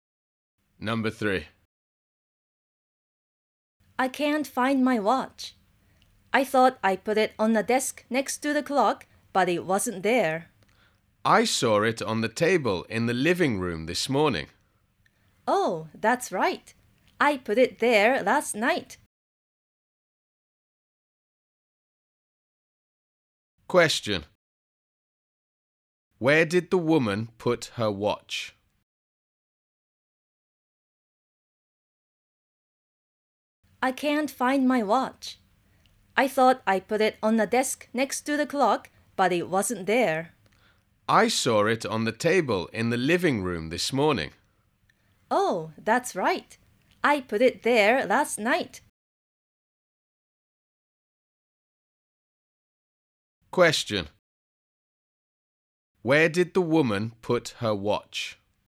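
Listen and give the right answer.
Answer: On the table in the living room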